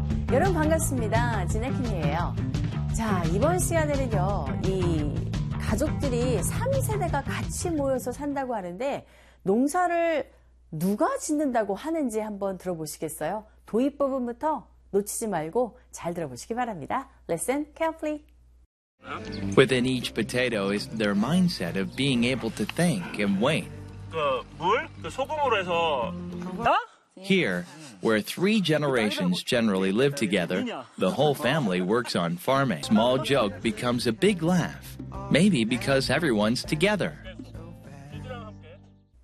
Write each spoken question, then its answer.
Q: 이 가족들이 3세대가 같이 모여서 산다고 하는데 농사를 누가 짓는다고 하는지 한번 들어보시겠어요?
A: 아하, 가족 전체가 다 농사를 짓는다고 하네요.